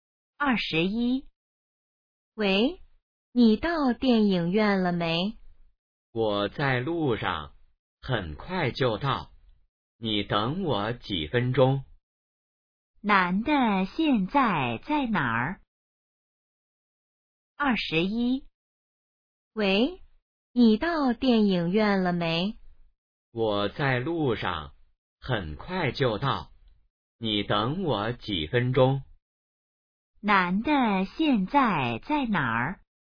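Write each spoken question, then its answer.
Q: 男的现在在哪儿?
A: 在路上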